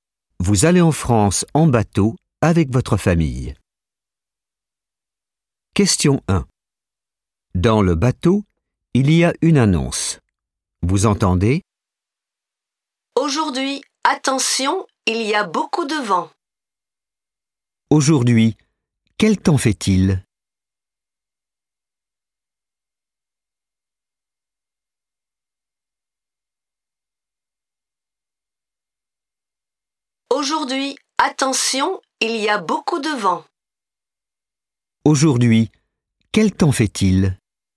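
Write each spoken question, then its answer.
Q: Aujourd'hui, quel temps fait-il ?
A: Il y a beaucoup de vent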